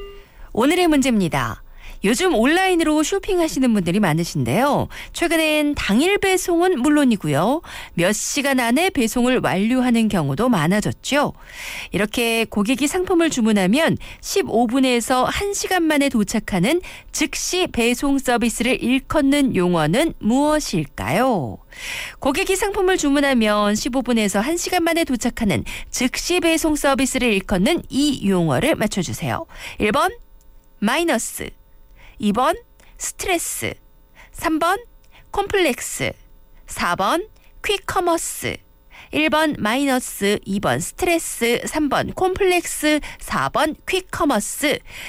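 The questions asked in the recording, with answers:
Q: 이렇게 고객이 상품을 주문하면 15분에서 1시간 만에 도착하는 즉시 배송 서비스를 일컫는 용어는 무엇일까요?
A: 4: 퀵커머스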